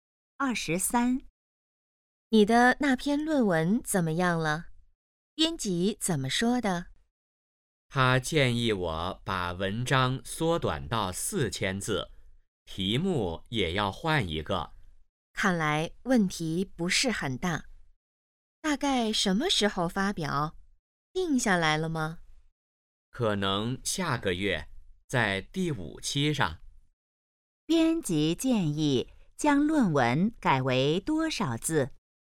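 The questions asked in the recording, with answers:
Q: 编辑建议将论文改为多少字?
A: 4000字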